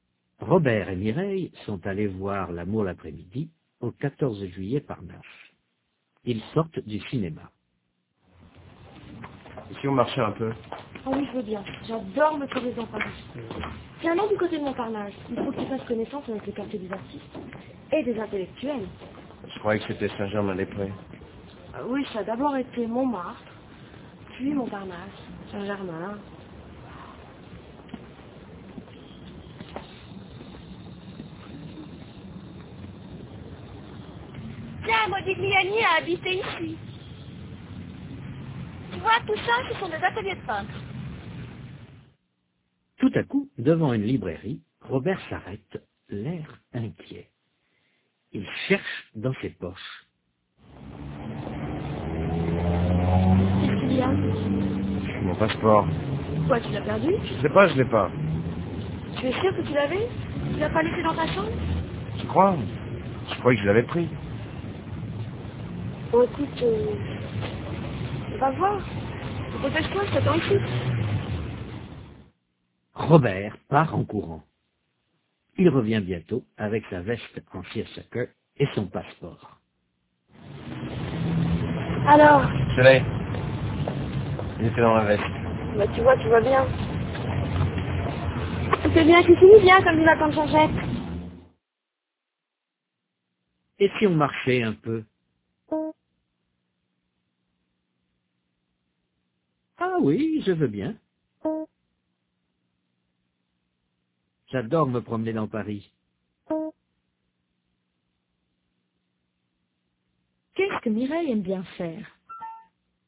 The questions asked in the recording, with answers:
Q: Qu'est-ce que Mireille aime bien faire?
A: Se promener dans Paris.